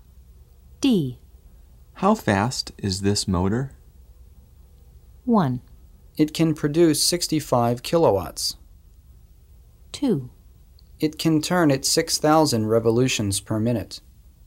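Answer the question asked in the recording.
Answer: 2: It can turn at 6,000 revolutions per minute.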